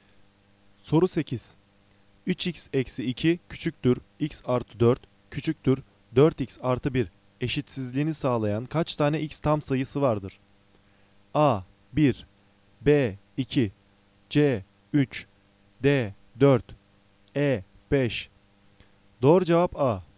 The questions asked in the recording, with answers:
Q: 3x eksi 2 küçüktür x artı 4 küçüktür 4x artı 1 eşitsizliğini sağlayan kaç tane x tam sayısı vardır?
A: Doğru cevap A. 1